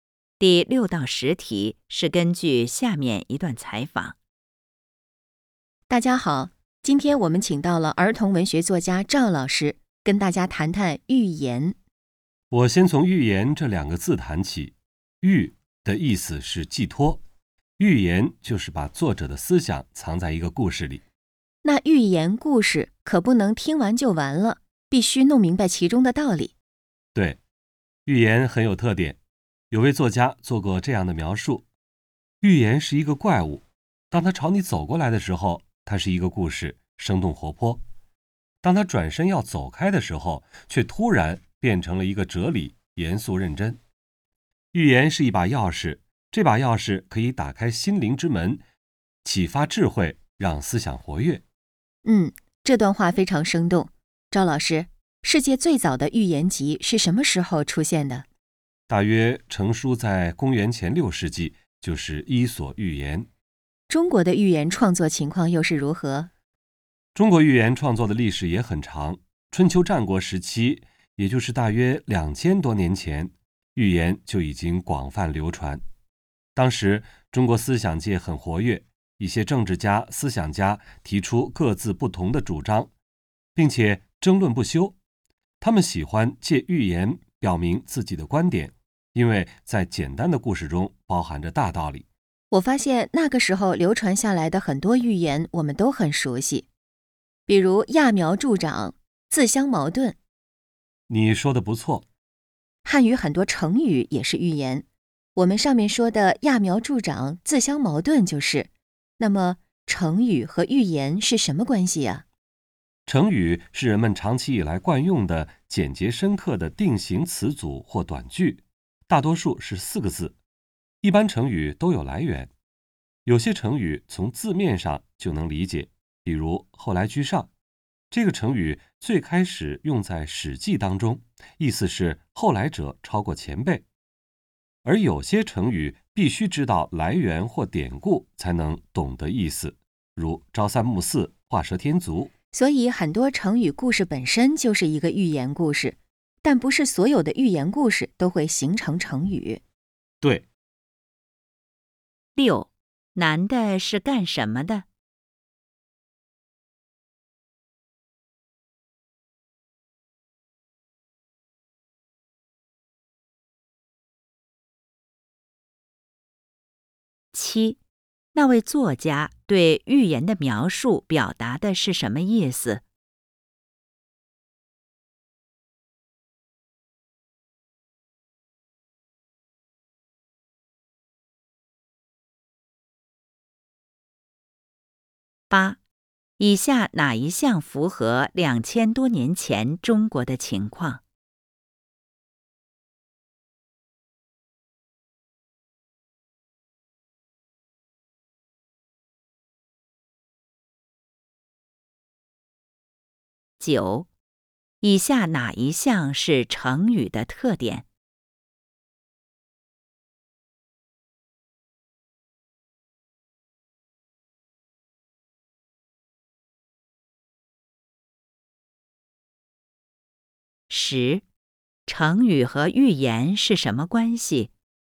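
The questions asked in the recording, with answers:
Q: 成语和寓言是什么关系?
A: 很多成语故事本身就是寓言,但不是所有寓言都会形成成语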